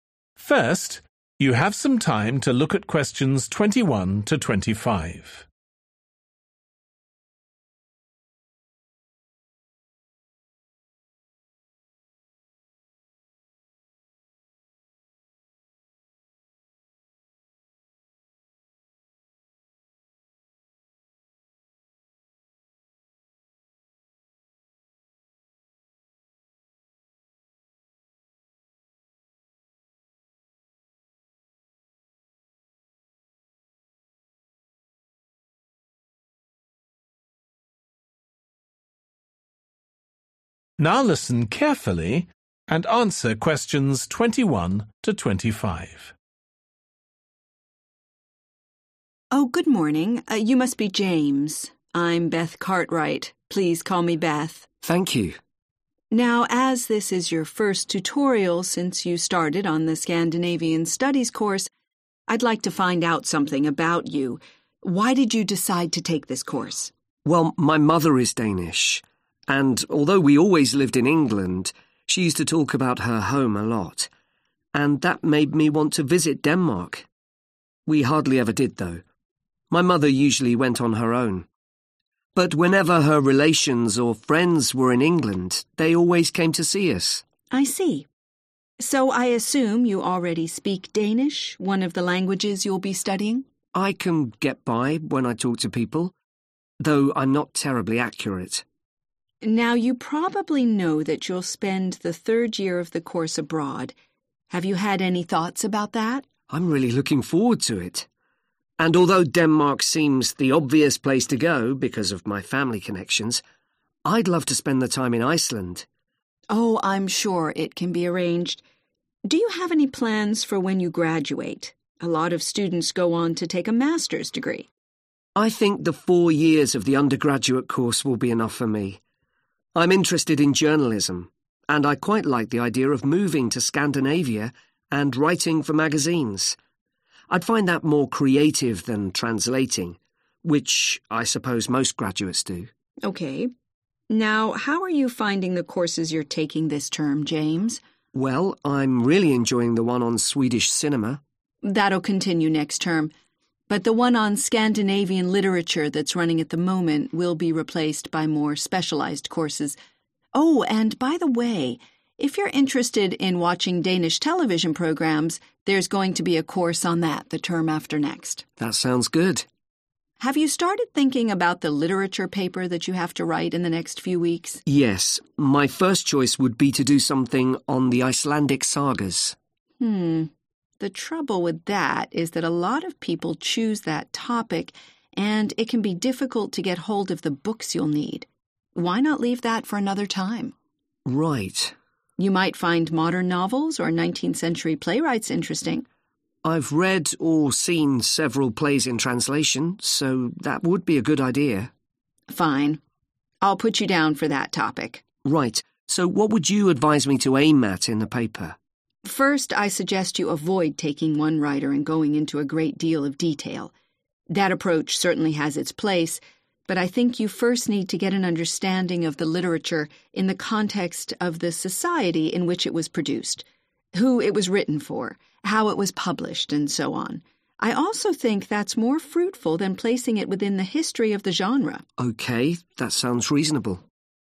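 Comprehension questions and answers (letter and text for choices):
Choose the correct letter, A, B or C.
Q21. James chose to take Scandinavian Studies because when he was a child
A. he was often taken to Denmark.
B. his mother spoke to him in Danish.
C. a number of Danish people visited his family.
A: C. a number of Danish people visited his family.

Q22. When he graduates, James would like to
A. take a postgraduate course.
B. work in the media.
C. become a translator.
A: B. work in the media.

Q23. Which course will end this term?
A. Swedish cinema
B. Danish television programmes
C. Scandinavian literature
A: C. Scandinavian literature

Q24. They agree that James's literature paper this term will be on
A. 19th century playwrights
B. the Icelandic sagas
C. modern Scandinavian novels.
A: A. 19th century playwrights

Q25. Beth recommends that James's paper should be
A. a historical overview of the genre.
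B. an in-depth analysis of a single writer.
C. a study of the social background to the literature.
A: C. a study of the social background to the literature.

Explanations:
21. Well, my mother is Danish, and although we always lived in England, she used to talk about her home a lot, and that made me want to visit Denmark. We hardly ever did, though – my mother usually went on her own. But whenever her relatives or friends were in England they always came to see us.(Tuy nhiên, chúng tôi hầu như không bao giờ làm vậy – mẹ tôi thường đi một mình. Nhưng bất cứ khi nào người thân hoặc bạn bè của bà ấy ở Anh, họ luôn đến gặp chúng tôi.)
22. I think the four years of the undergraduate course will be enough for me. I'm interested in journalism, and I quite like the idea of moving to Scandinavia and writing for magazines (Tôi quan tâm đến báo chí và tôi khá thích ý tưởng chuyển đến Scandinavia và viết cho tạp chí)
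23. That'll continue next term, but the one on Scandinavian literature that's running at the moment will be replaced by more specialised courses (Khóa học đó sẽ tiếp diễn trong học kỳ tới, nhưng khóa học về văn học Scandinavia đang diễn ra vào thời điểm hiện tại sẽ được thay thế bằng các khóa học chuyên biệt hơn)
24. You might find modern novels or 19th century playwrights interesting. (Bạn có thể thấy hứng thú với những cuốn tiểu thuyết hiện đại hoặc những nhà viết kịch thế kỷ 19) I've read or seen several plays in translation, so that would be a good idea. (Tôi đã đọc hoặc xem một số vở kịch được dịch, vì vậy đó sẽ là một ý tưởng hay.)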